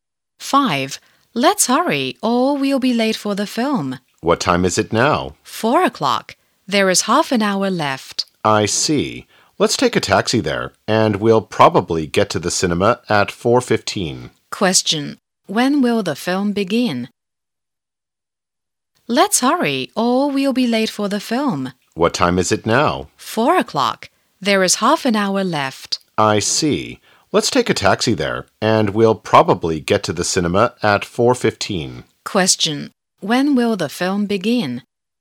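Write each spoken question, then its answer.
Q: When will the film begin?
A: At 4:30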